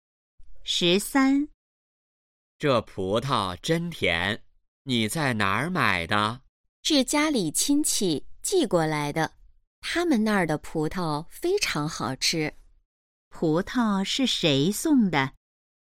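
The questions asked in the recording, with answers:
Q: 葡萄是谁送的?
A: 家里亲戚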